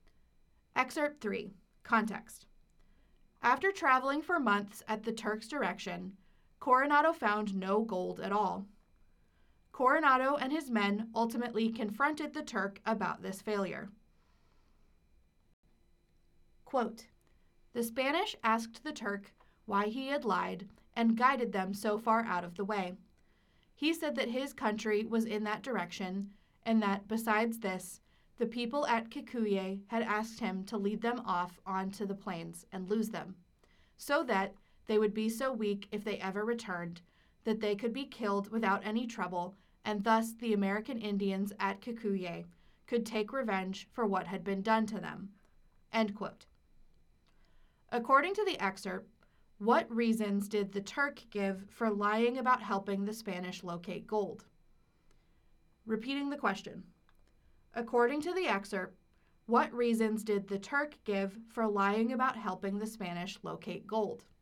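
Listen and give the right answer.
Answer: His country was that way, and the people at Kikuyé asked him to lose the Spanish on the plains so they would be weak and could be killed in revenge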